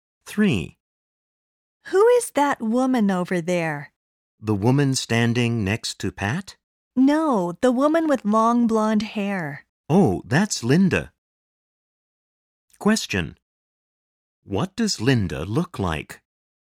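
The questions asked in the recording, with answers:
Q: What does Linda look like?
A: She has long blonde hair.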